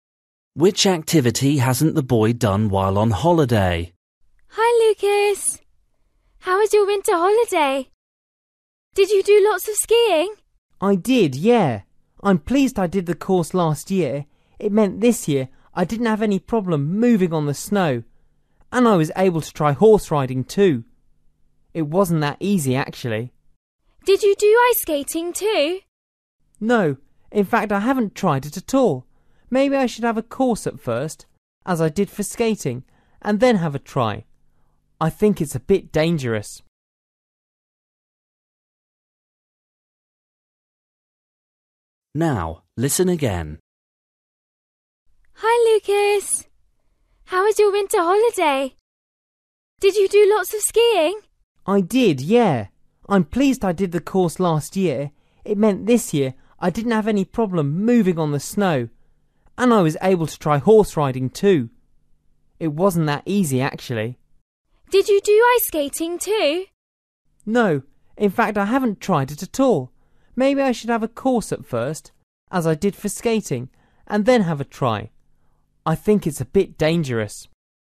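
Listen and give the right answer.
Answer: ice skating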